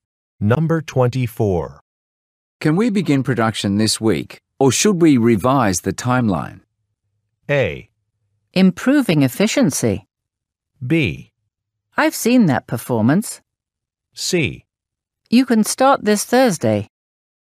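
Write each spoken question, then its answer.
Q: Can we begin production this week, or should we revise the timeline?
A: C: You can start this Thursday.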